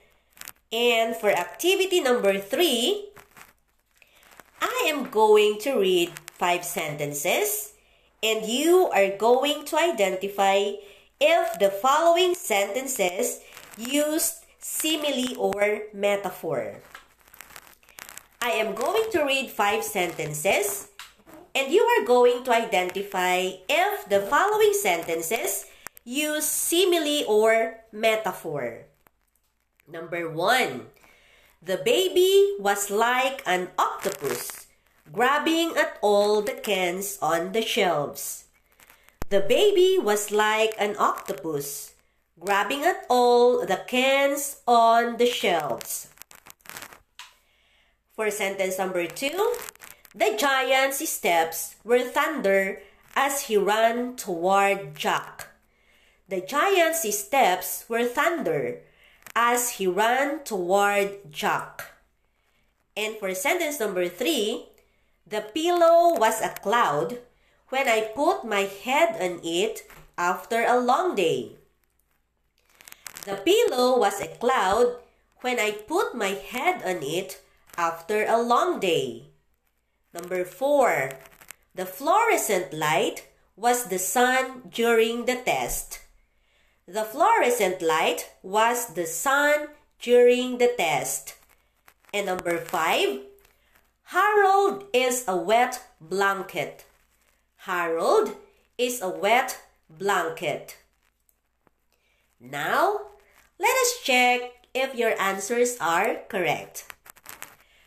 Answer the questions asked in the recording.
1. So number one, simile.
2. Number two, metaphor.
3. Number three, metaphor.
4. Number four, metaphor.
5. And number five, another metaphor.